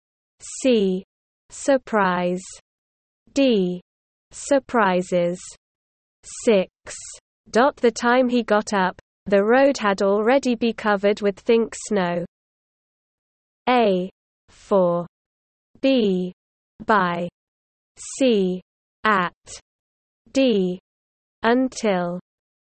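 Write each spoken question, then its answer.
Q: Dot the time he got up, the road had already be covered with think snow.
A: B: By.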